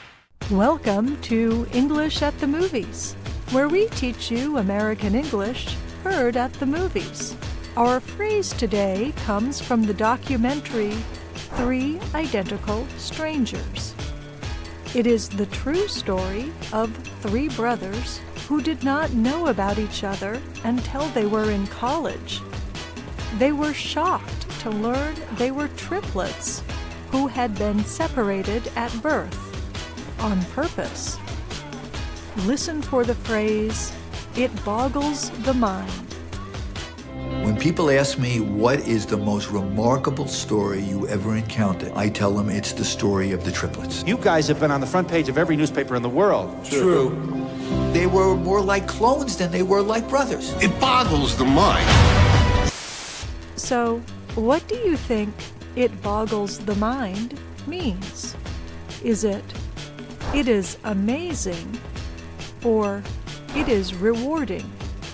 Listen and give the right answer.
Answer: It boggles the mind means it is amazing.